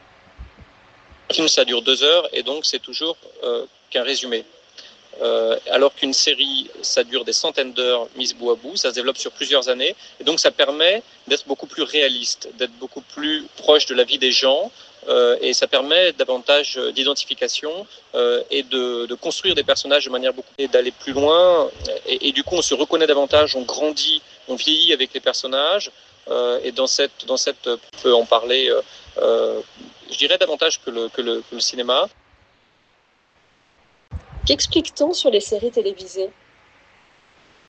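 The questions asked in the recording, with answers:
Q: Qu'explique-t-on sur les séries télévisées?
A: Elles durent des centaines d'heures sur plusieurs années, donc elles sont plus réalistes et proches de la vie des gens et permettent davantage d'identification aux personnages que le cinéma.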